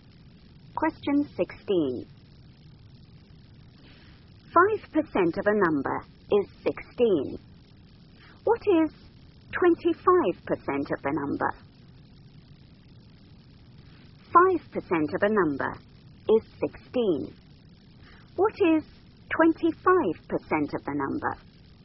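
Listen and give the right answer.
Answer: 80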